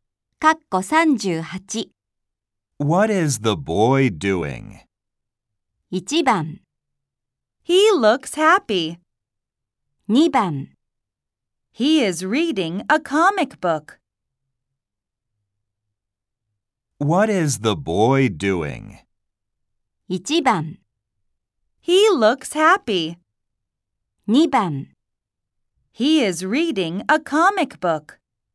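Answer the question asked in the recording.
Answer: 2: He is reading a comic book.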